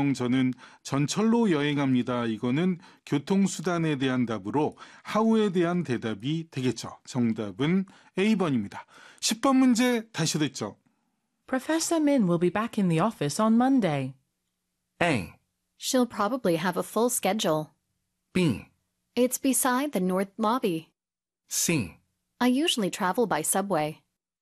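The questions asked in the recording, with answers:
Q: Professor Min will be back in the office on Monday.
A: A: She'll probably have a full schedule.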